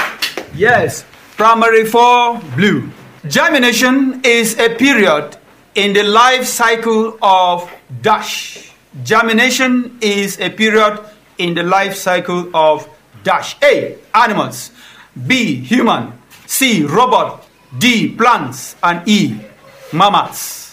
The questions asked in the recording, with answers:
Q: Germination is a period in the life cycle of dash.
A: D, plants.